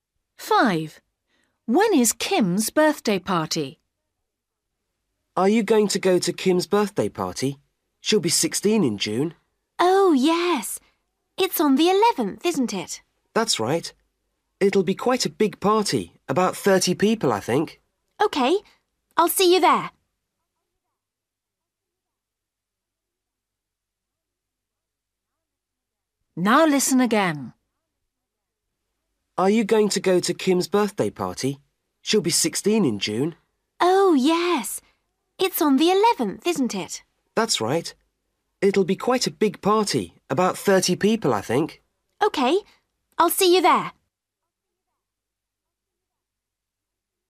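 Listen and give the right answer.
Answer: June 11th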